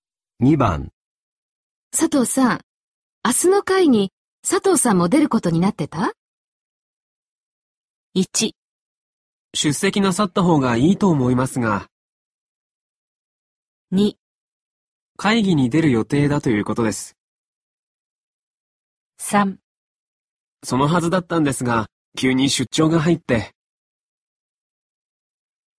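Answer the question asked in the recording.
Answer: 3: そのはずだったんですが、急に出張が入って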